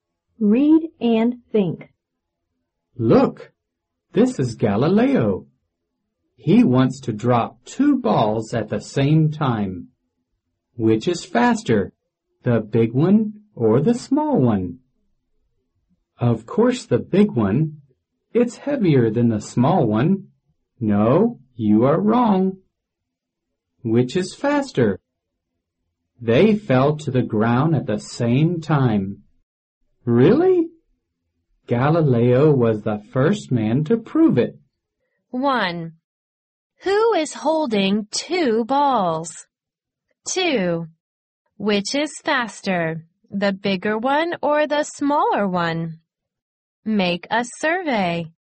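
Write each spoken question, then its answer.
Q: Who is holding two balls?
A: Galileo

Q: Which is faster, the bigger one or the smaller one?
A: Neither; they fall to the ground at the same time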